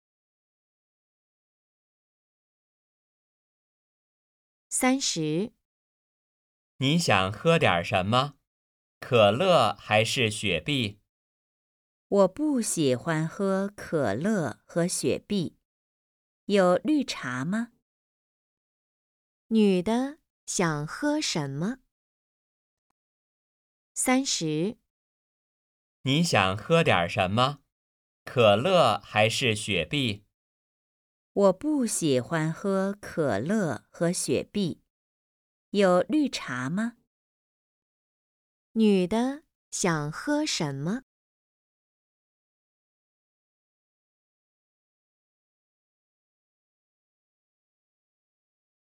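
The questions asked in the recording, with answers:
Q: 女的想喝什么?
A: 绿茶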